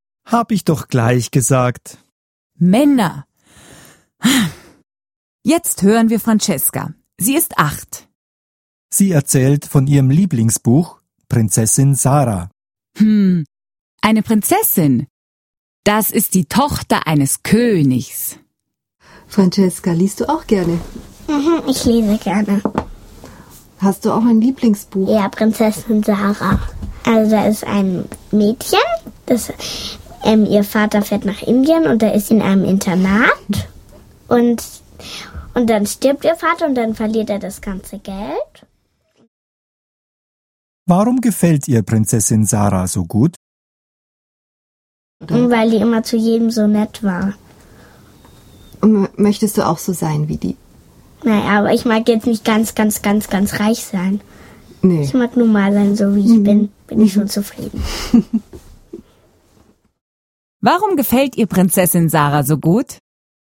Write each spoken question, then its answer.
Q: Warum gefällt ihr Prinzessin Sarah so gut?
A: Weil Prinzessin Sarah zu jedem so nett war.